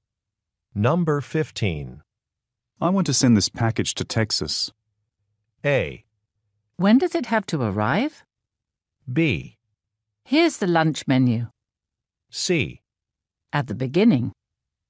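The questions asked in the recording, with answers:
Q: I want to send this package to Texas.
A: A: When does it have to arrive?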